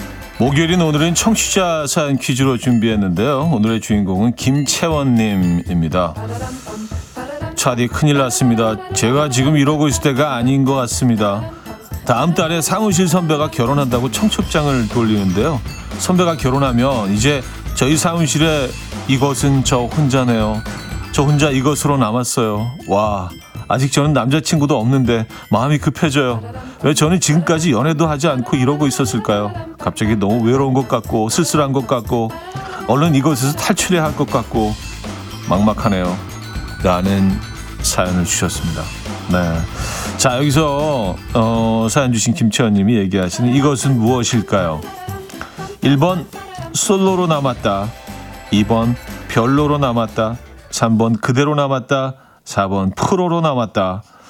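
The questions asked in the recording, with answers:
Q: 자, 여기서 사연 주신 김채원님이 얘기하시는 이것은 무엇일까요?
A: 1번: 솔로로 남았다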